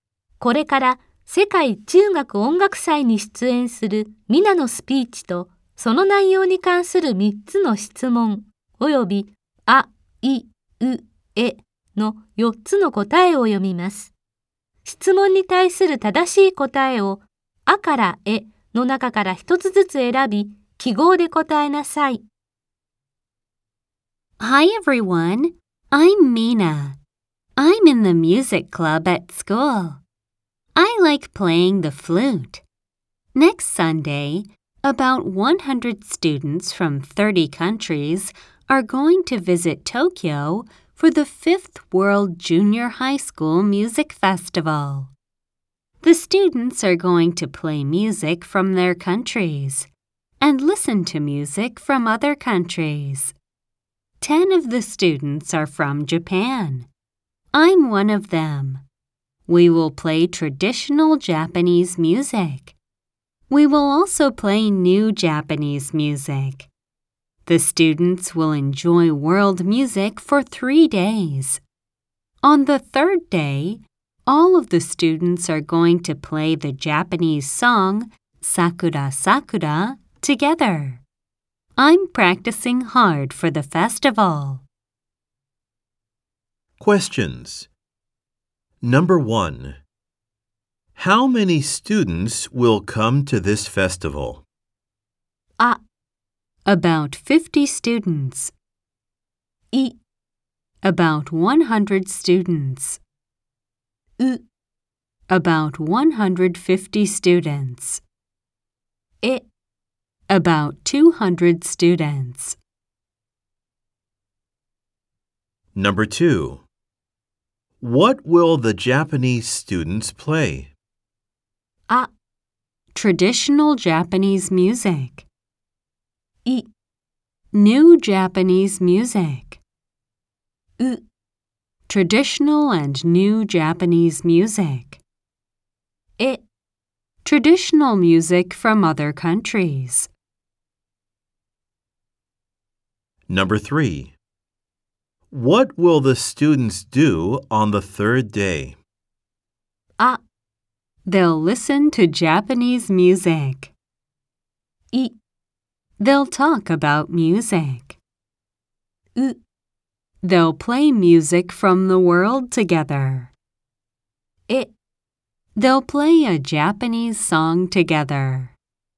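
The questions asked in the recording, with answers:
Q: How many students will come to this festival?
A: I: About 100 students.

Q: What will the Japanese students play?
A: U: Traditional and new Japanese music.

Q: What will the students do on the 3rd day?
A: E: They'll play a Japanese song together.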